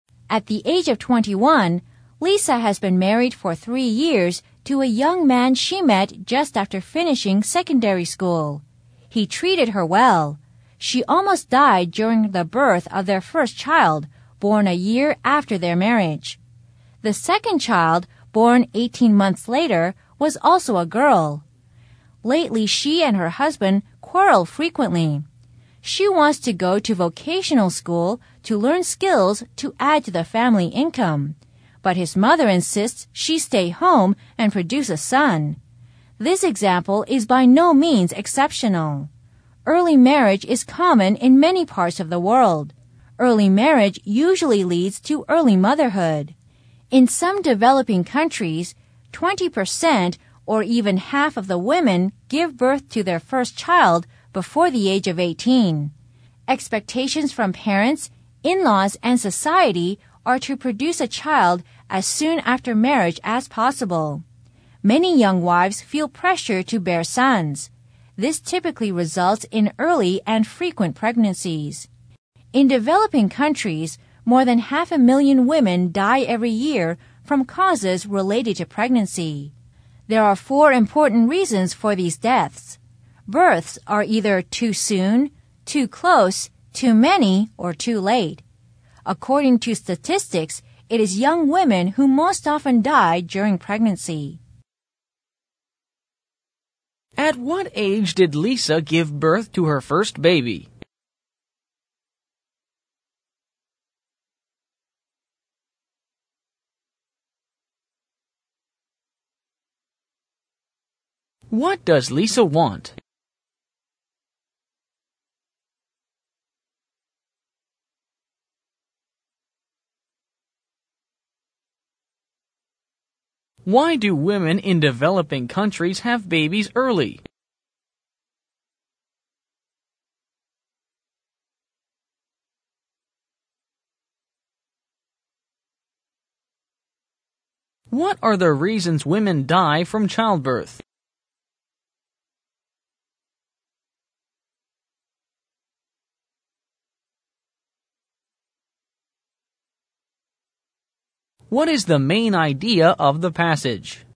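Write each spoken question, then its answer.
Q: At what age did Lisa give birth to her first baby?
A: At 19

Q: What does Lisa want?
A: To go to vocational school to learn skills and add to the family income

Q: Why do women in developing countries have babies early?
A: Parents, in-laws and society expect them to have a child, especially a son, soon after marriage

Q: What are the reasons women die from childbirth?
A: Births that are too soon, too close, too many, or too late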